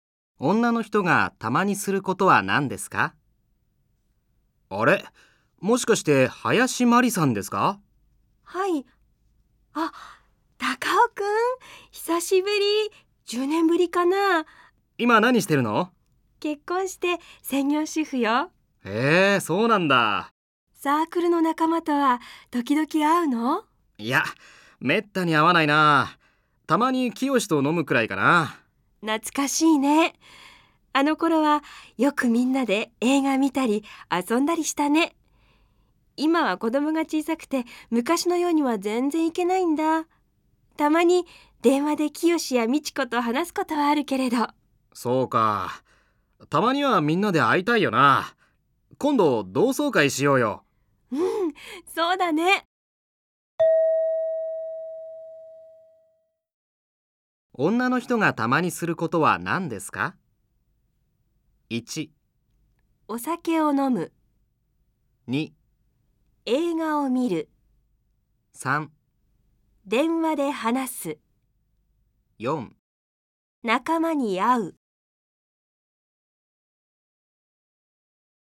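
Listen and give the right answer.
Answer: 3: 電話で話す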